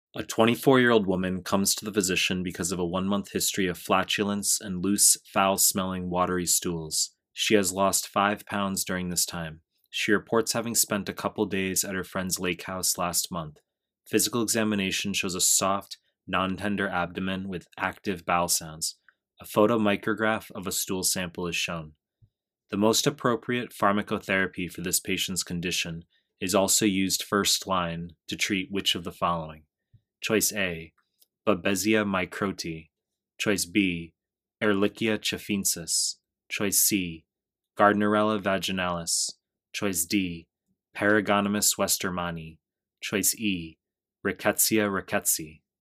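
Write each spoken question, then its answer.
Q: The most appropriate pharmacotherapy for this patient's condition is also used first line to treat which of the following?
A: C: Gardnerella vaginalis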